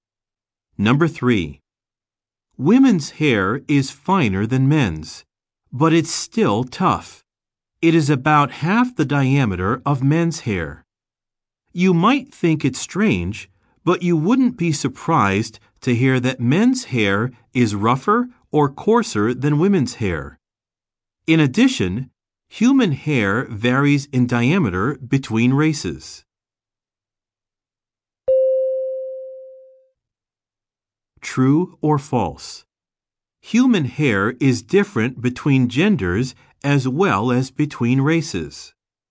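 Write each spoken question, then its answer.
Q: True or false? Human hair is different between genders as well as between races.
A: True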